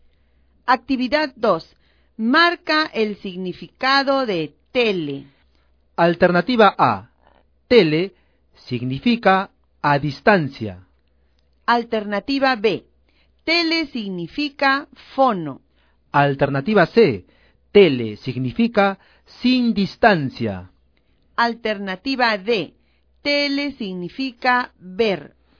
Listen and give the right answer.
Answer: La alternativa correcta es la letra A.